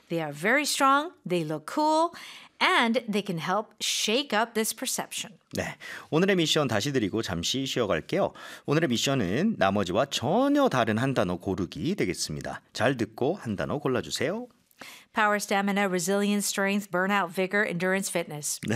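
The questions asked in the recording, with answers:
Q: 오늘의 미션은 나머지와 전혀 다른 한 단어 고르기 되겠습니다.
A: burnout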